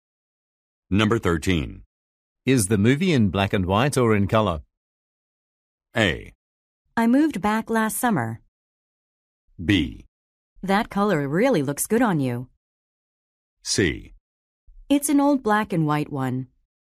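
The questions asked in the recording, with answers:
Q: Is the movie in black and white or in color?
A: C: It's an old black and white one.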